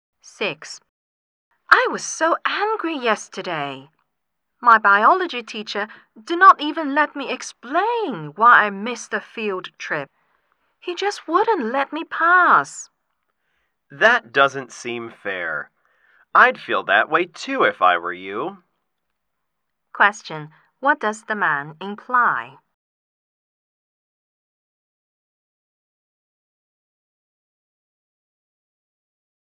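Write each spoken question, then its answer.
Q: What does the man imply?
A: He sympathizes with the woman and thinks the teacher was unfair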